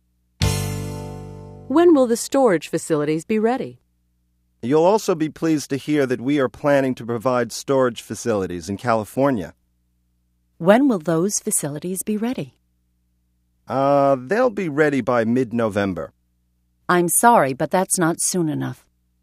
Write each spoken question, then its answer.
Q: When will the storage facilities be ready?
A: They'll be ready by the middle of November.